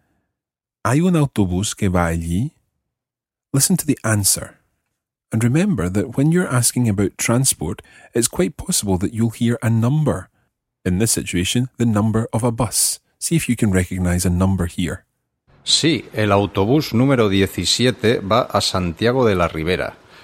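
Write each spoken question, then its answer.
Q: See if you can recognize a number here.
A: 17 (bus number 17)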